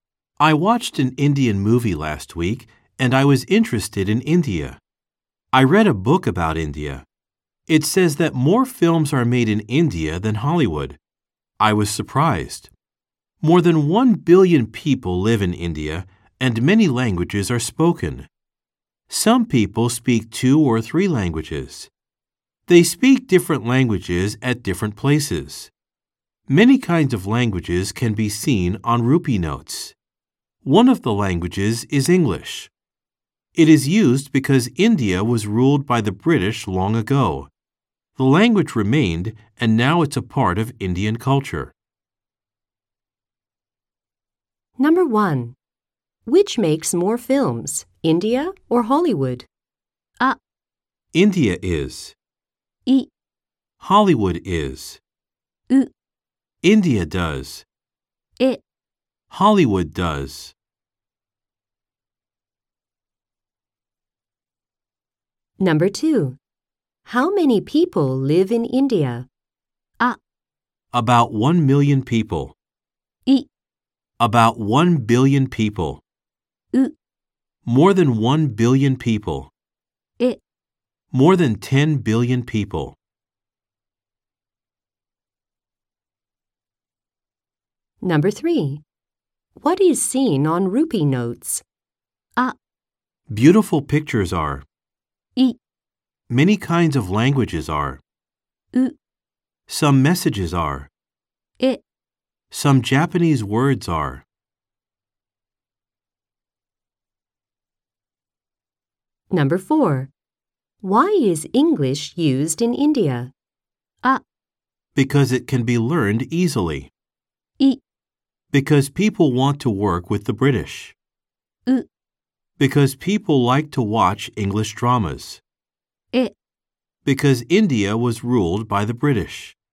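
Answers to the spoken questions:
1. う: India does.
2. う: More than 1 billion people.
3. い: Many kinds of languages are.
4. え: Because India was ruled by the British.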